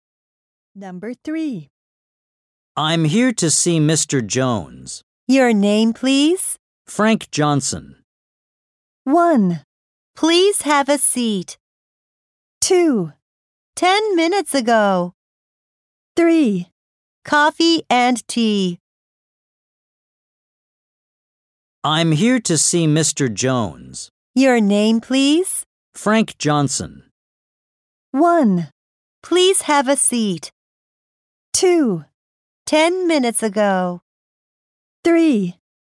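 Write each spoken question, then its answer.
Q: Frank Johnson.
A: 1: Please have a seat.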